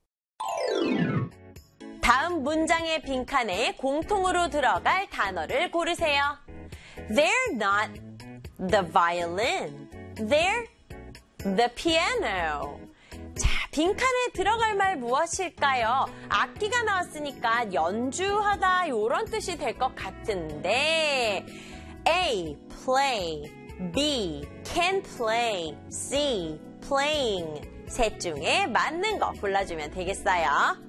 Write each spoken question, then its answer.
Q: 다음 문장의 빈칸에 공통으로 들어갈 단어를 고르세요.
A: play에다가 ing 붙여서 playing.